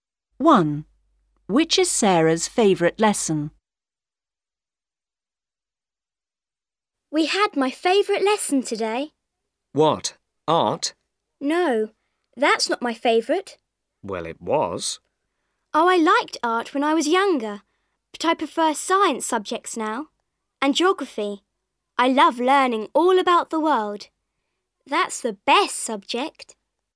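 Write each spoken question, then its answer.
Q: Which is Sarah's favourite lesson?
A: Geography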